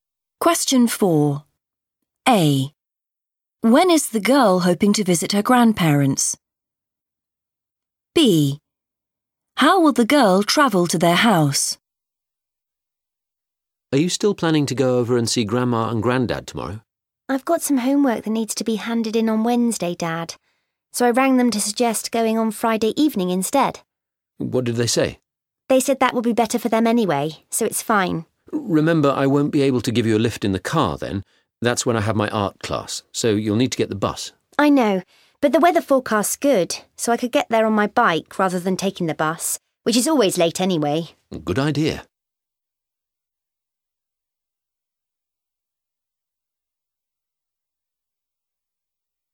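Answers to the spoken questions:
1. Friday evening
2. by bike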